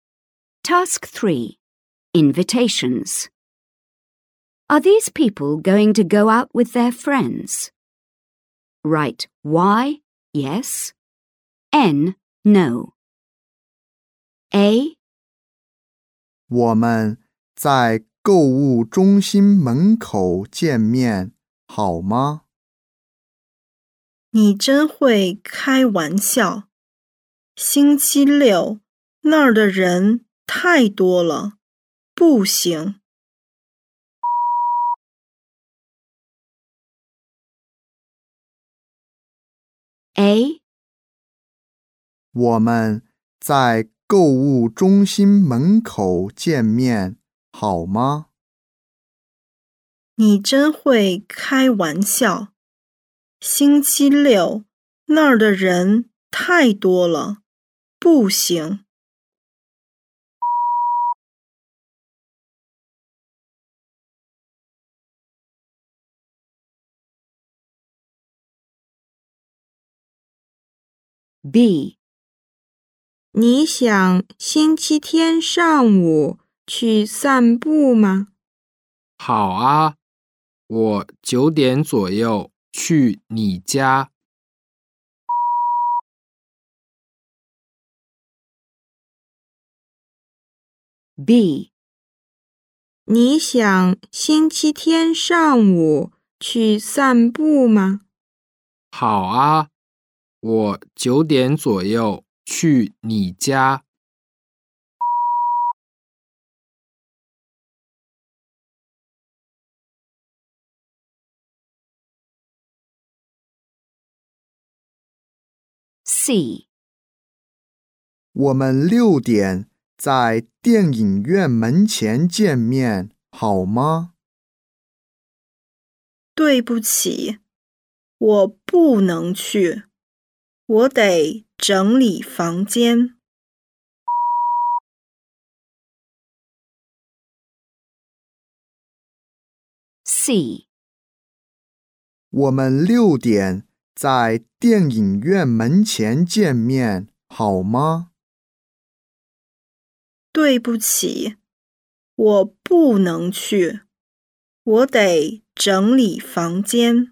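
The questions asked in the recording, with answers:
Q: Are these people going to go out with their friends?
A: N: no

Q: Are these people going to go out with their friends?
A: Y: yes

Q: Are these people going to go out with their friends?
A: N: no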